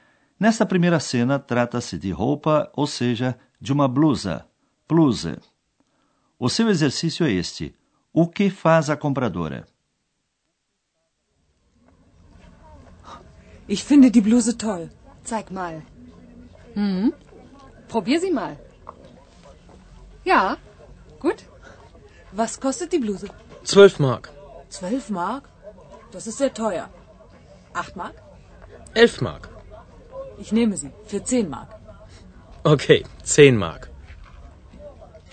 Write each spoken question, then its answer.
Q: O que faz a compradora?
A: O comprador pechincha tentando obter um preço mais baixo.